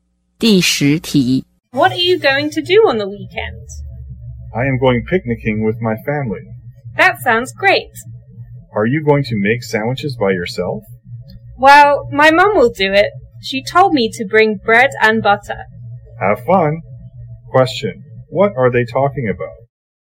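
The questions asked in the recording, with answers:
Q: what are they talking about?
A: Weekend plans (a family picnic)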